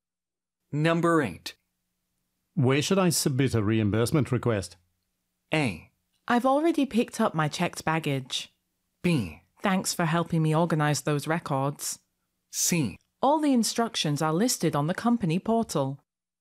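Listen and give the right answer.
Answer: C: All the instructions are listed on the company portal.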